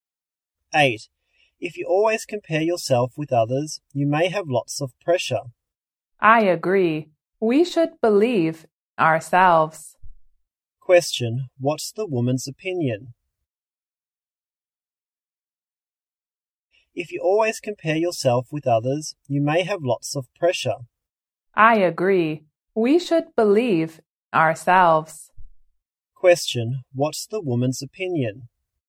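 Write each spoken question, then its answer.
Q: what's the woman's opinion?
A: We should believe in ourselves rather than compare ourselves with others.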